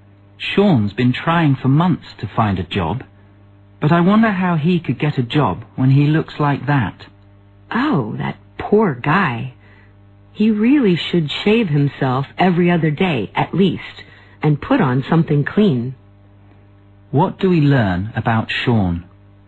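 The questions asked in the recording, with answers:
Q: What do we learn about Sean?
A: He looks messy and untidy, which may be why he can't get a job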